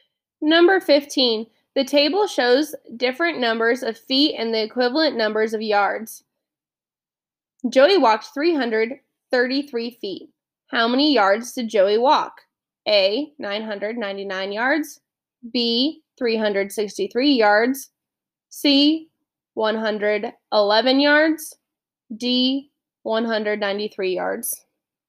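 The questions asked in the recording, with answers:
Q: Joey walked 333 feet. How many yards did Joey walk?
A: C: 111 yards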